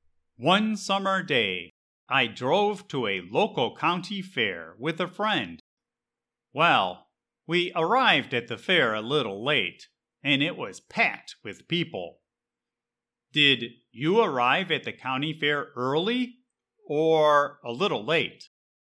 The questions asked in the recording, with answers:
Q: Did you arrive at the county fair early or a little late?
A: My friend and I arrived at the county fair a little late, and it was packed.